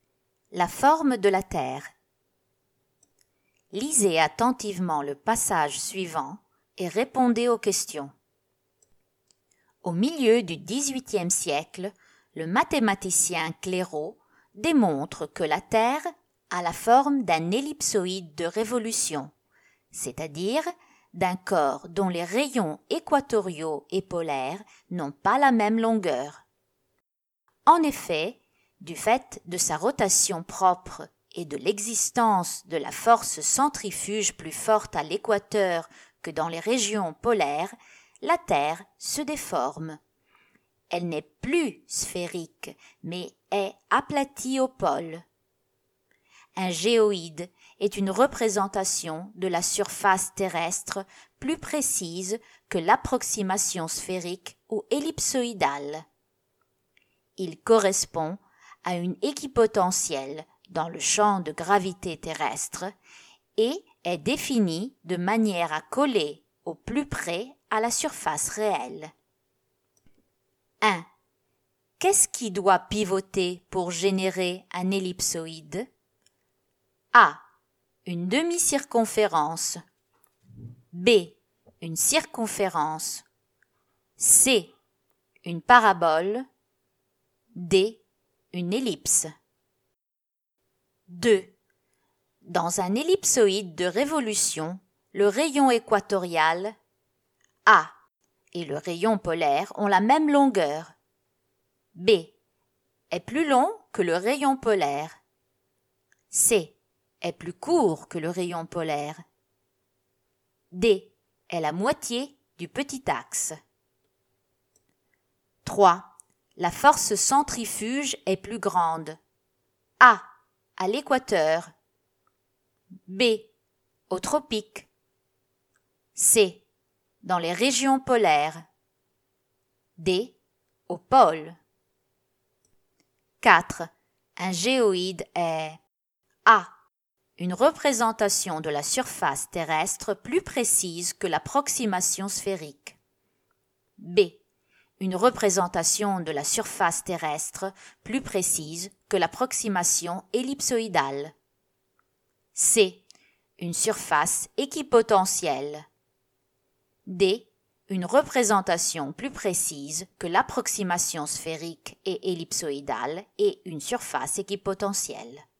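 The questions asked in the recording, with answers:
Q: Dans un ellipsoïde de révolution, le rayon équatorial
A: B: est plus long que le rayon polaire.

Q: La force centrifuge est plus grande.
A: A: À l'équateur.

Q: Un géoïde est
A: D: Une représentation plus précise que l'approximation sphérique et ellipsoïdale et une surface équipotentielle.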